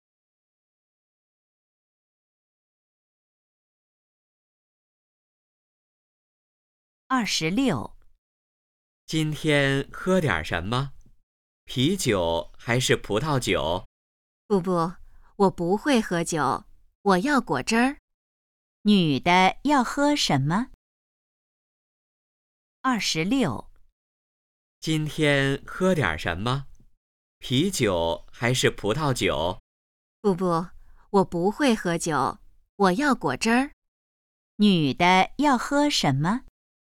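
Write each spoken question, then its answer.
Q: 女的要喝什么?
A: 果汁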